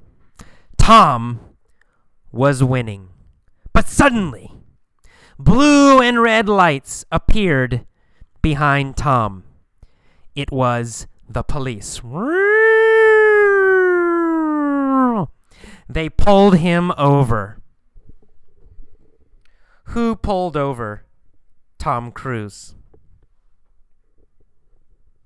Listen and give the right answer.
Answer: Well, the police. The police pulled over Tom Cruise.